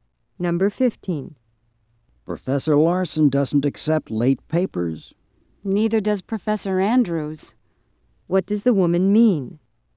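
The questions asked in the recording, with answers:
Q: What does the woman mean?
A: Professor Andrews doesn't accept late papers either.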